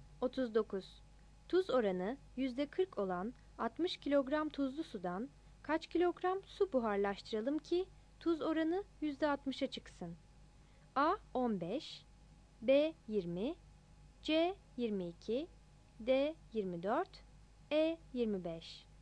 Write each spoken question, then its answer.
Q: Tuz oranı %40 olan 60 kilogram tuzlu sudan kaç kilogram su buharlaştıralım ki tuz oranı %60'a çıksın?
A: 39 B